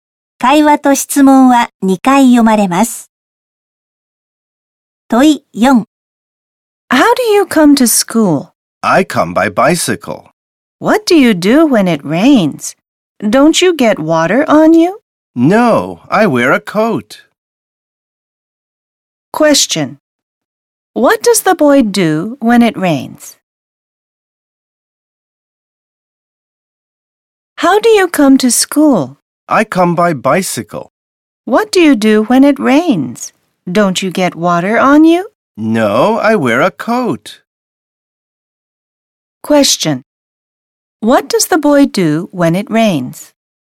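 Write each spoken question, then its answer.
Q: What does the boy do when it rains?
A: He wears a coat.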